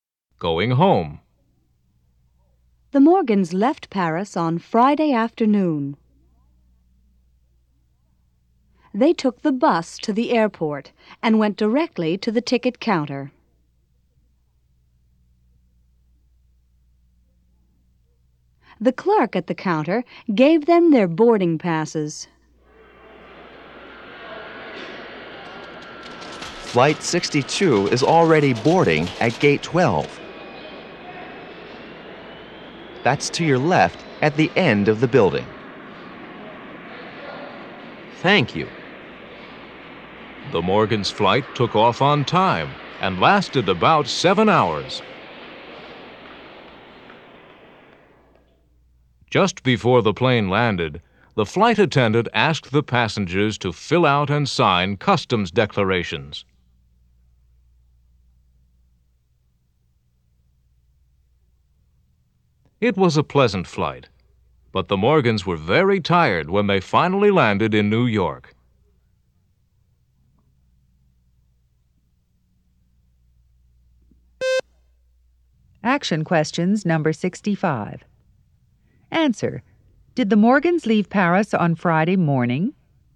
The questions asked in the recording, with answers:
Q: Did the Morgans leave Paris on Friday morning?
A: No, they didn't.